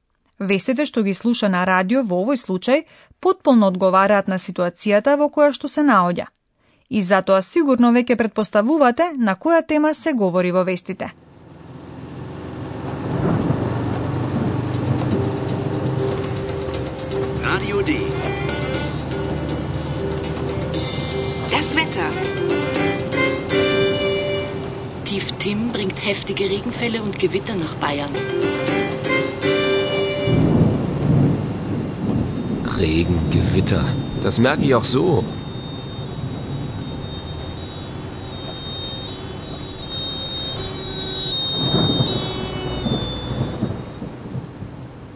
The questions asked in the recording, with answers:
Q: И затоа сигурно веќе предпоставувате на која тема се говори во вестите.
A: Темата на вестите беше времето.